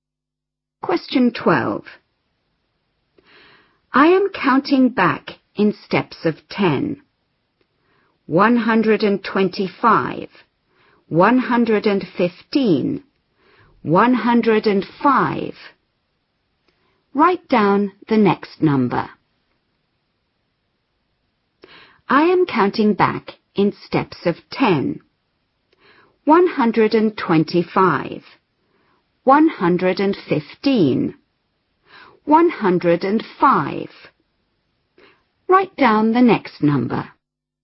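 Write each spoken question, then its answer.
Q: Write down the next number.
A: 95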